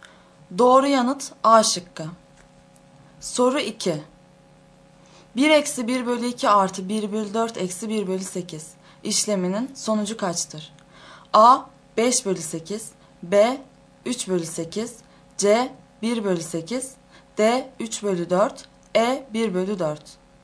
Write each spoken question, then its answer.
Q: 1 eksi 1 bölü 2 artı 1 bölü 4 eksi 1 bölü 8 işleminin sonucu kaçtır?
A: Doğru yanıt A şıkkı.